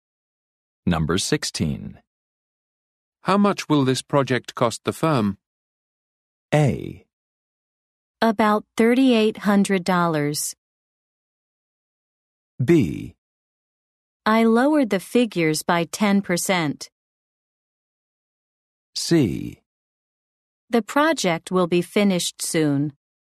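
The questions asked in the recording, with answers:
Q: How much will this project cost the firm?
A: A: About $3,800.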